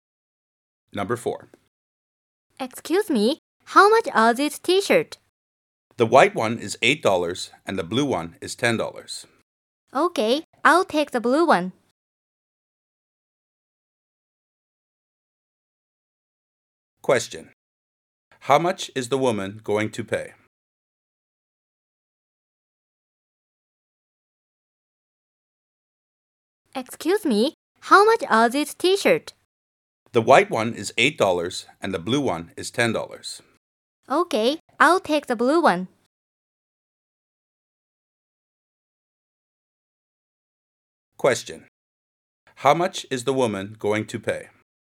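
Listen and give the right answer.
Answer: $10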